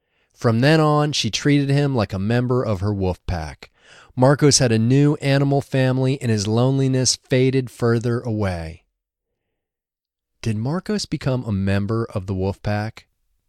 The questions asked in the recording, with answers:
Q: Did Marcos become a member of the wolf pack?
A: Yes, Marcos became a member of the wolf pack.